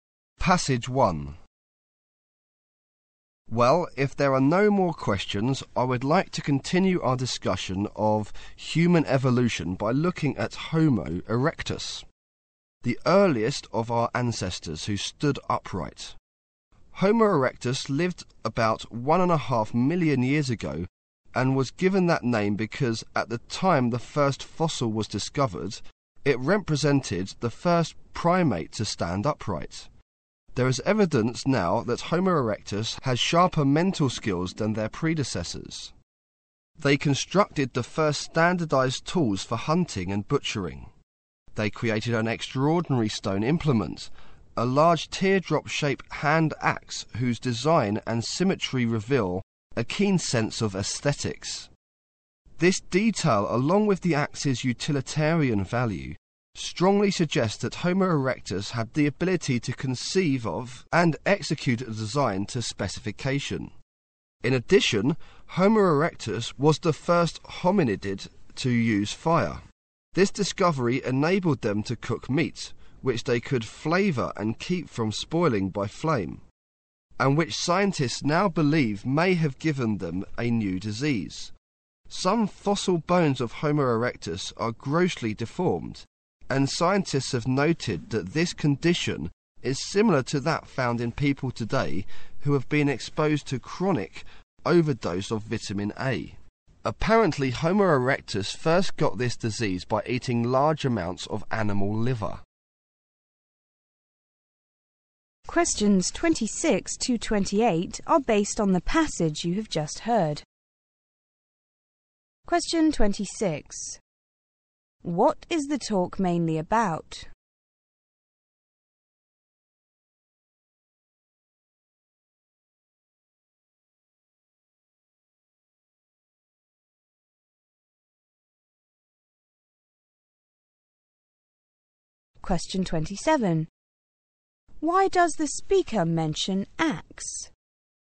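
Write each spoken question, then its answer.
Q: What is the talk mainly about?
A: Homo erectus

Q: Why does the speaker mention axe?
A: To show Homo erectus had a sense of aesthetics and could carry out a design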